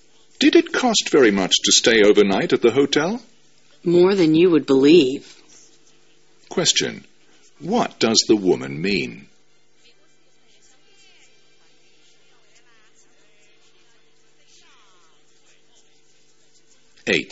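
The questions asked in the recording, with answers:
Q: What does the woman mean?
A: The hotel was very expensive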